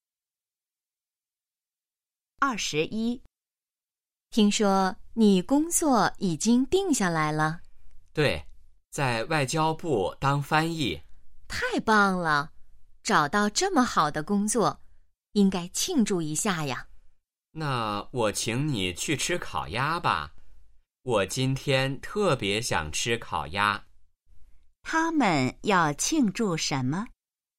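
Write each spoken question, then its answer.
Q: 他们要庆祝什么?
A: 找到了好工作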